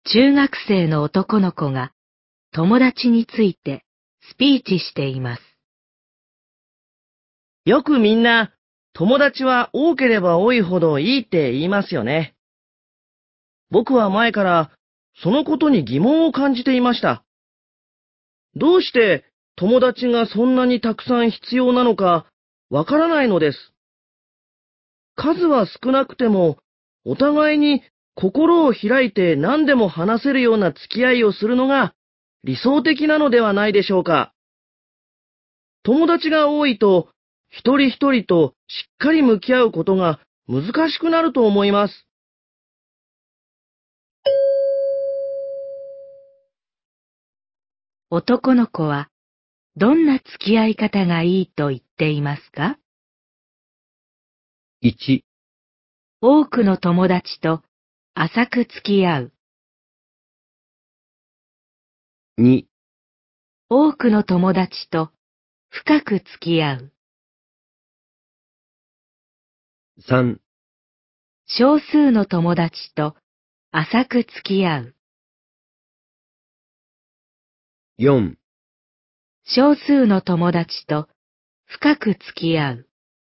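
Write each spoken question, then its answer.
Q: 男の子はどんな付き合い方がいいと言っていますか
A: 4: 少数の友達と深く付き合う。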